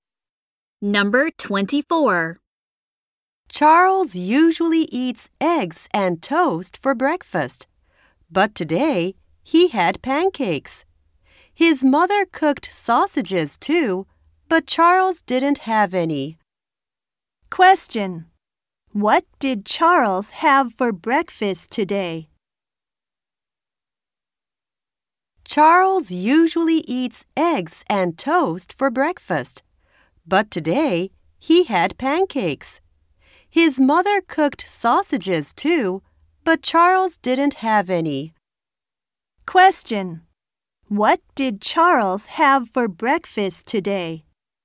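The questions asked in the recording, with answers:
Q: What did Charles have for breakfast today?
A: Pancakes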